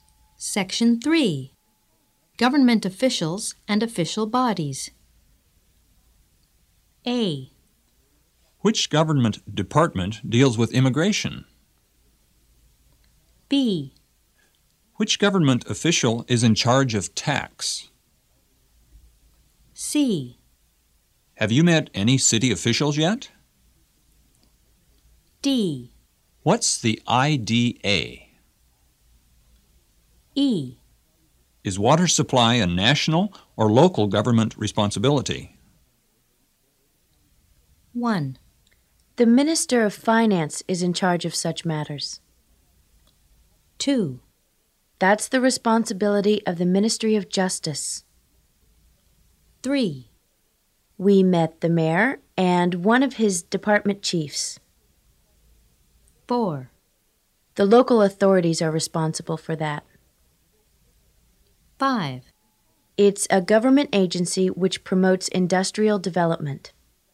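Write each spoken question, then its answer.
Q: The Minister of Finance is in charge of such matters.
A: B: Which government official is in charge of tax?

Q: That's the responsibility of the Ministry of Justice.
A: A: Which government department deals with immigration?

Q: We met the mayor and one of his department chiefs.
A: C: Have you met any city officials yet?

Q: The local authorities are responsible for that.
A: E: Is water supply a national or local government responsibility?

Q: It's a government agency which promotes industrial development.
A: D: What's the IDA?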